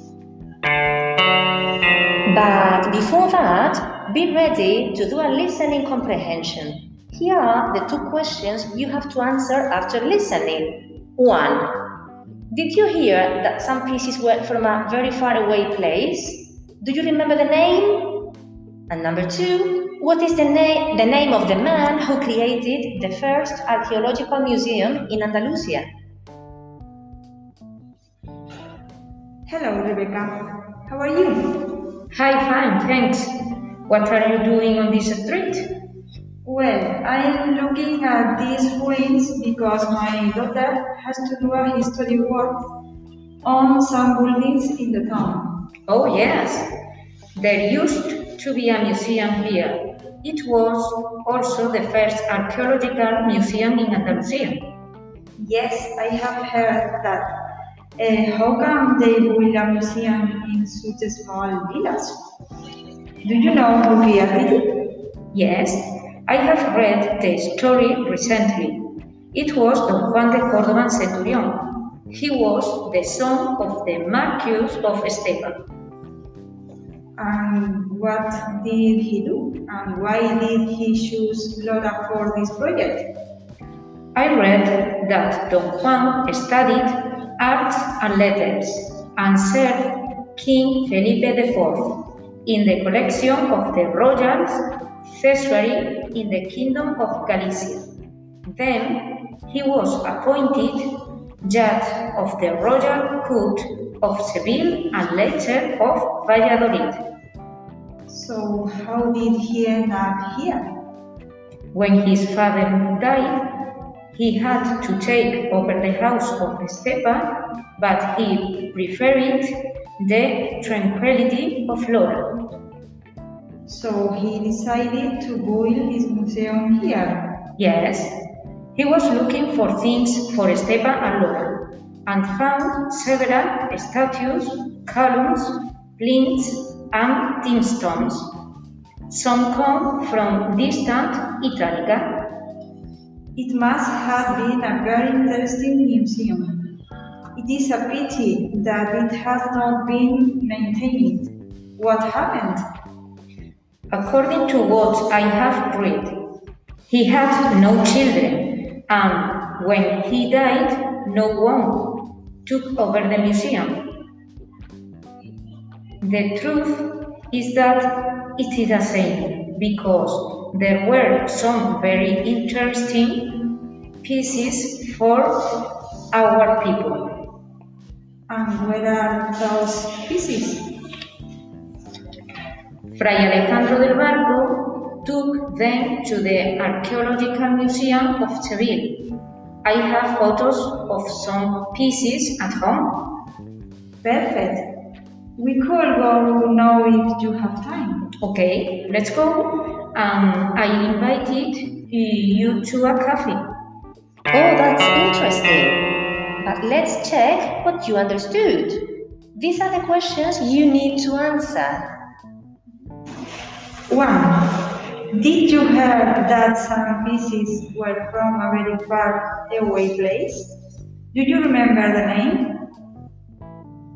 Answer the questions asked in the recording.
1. The answer is that same pieces were from Italica.
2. The answer is, his name is Juan de Córdoba and Centurión.